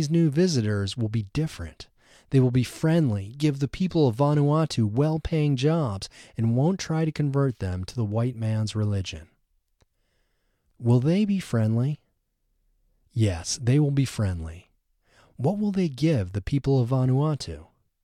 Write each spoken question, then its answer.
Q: What will they give the people of Vanuatu?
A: They will give the people of Vanuatu well-paying jobs.